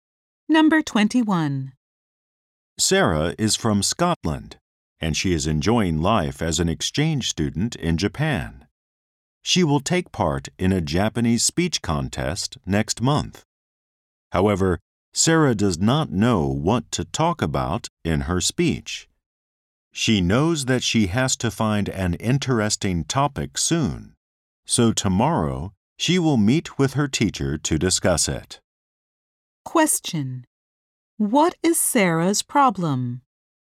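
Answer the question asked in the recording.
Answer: She does not know what to talk about in her speech.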